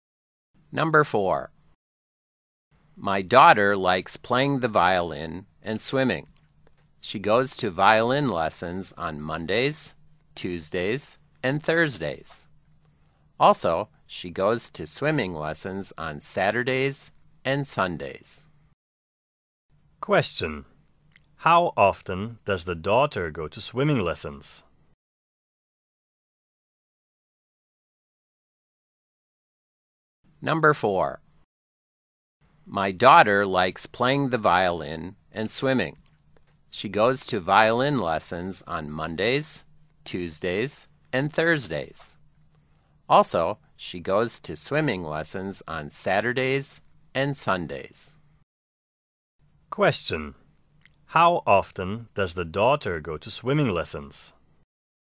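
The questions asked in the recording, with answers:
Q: How often does the daughter go to swimming lessons?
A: Twice a week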